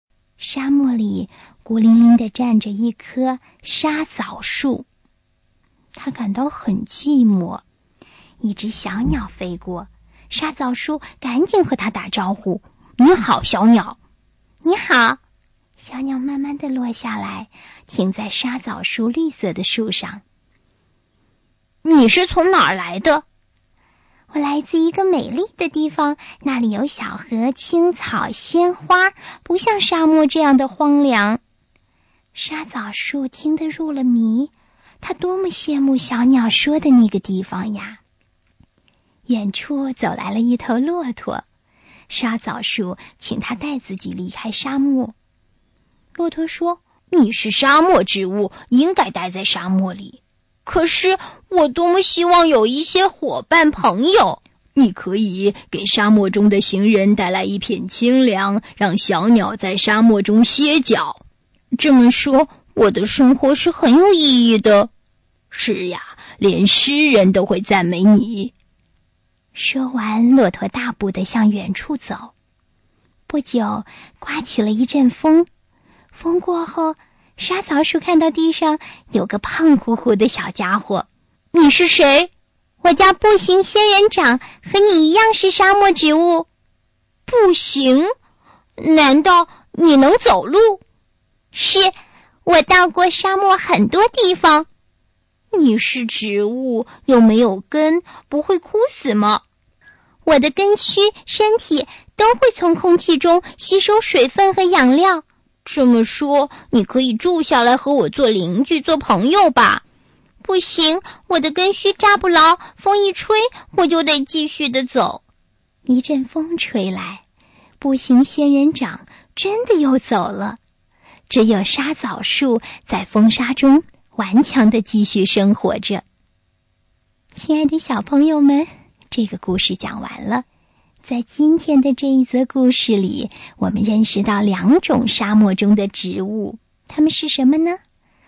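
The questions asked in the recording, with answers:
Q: 在今天的这一则故事里,我们认识到两种沙漠中的植物,它们是什么呢?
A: 沙枣树和步行仙人掌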